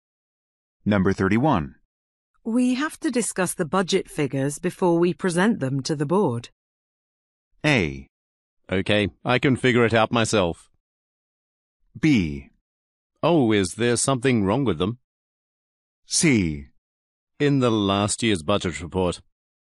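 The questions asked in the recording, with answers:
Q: We have to discuss the budget figures before we present them to the board.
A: B: Oh, is there something wrong with them?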